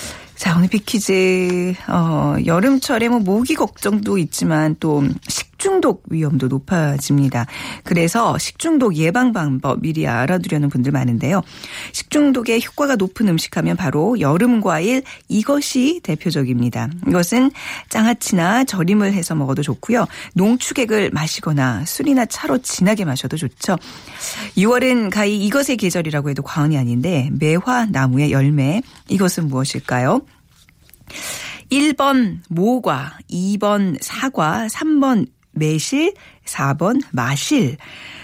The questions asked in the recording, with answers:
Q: 6월은 가히 이것의 계절이라고 해도 과언이 아닌데 매화 나무의 열매 이것은 무엇일까요?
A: 자, 오늘 정답, 예, 매실입니다.